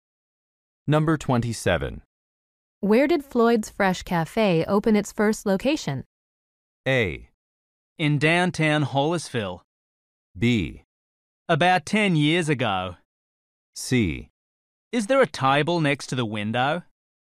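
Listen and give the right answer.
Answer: A: In downtown Hollisville.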